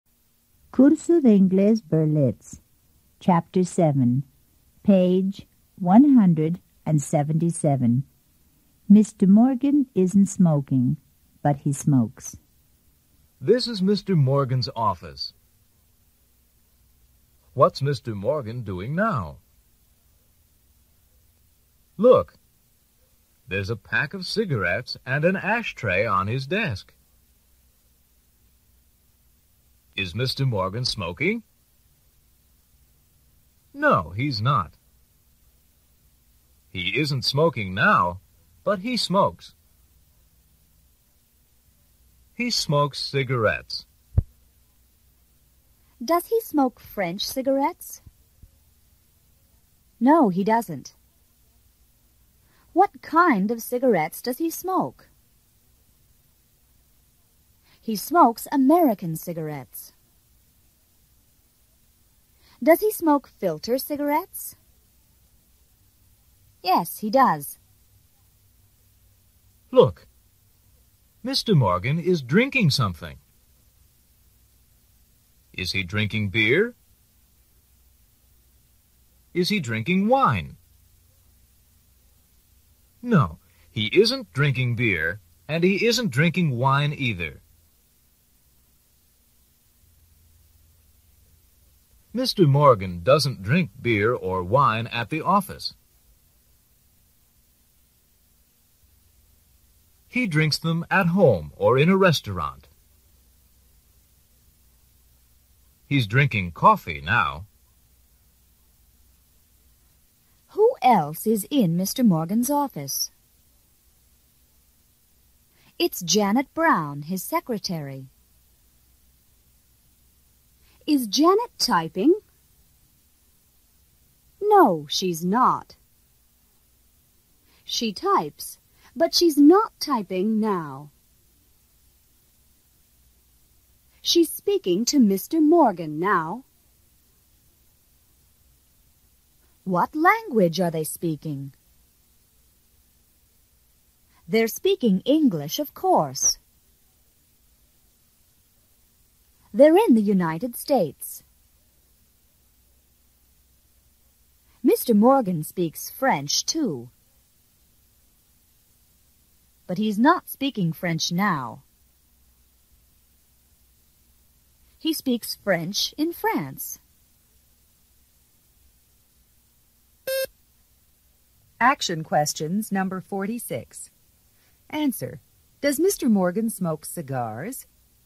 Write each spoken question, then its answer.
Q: Does Mr. Morgan smoke cigars?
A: No, he doesn't.